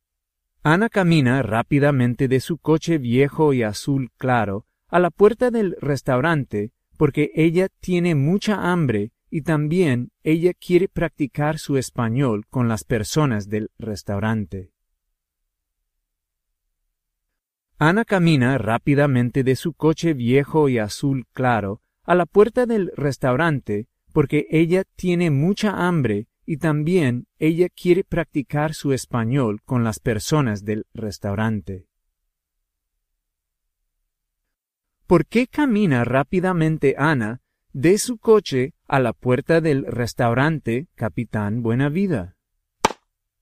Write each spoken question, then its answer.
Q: ¿Por qué camina rápidamente Ana de su coche a la puerta del restaurante Capitán Buena Vida?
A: Ana camina rápidamente de su coche a la puerta del restaurante porque ella quiere practicar su español con las personas del restaurante y también ella tiene mucha hambre.